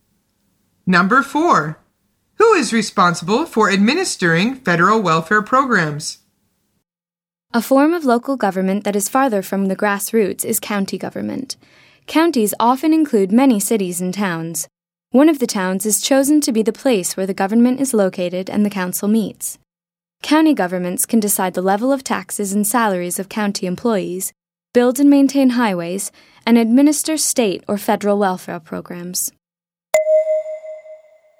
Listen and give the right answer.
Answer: The answer is the county governments.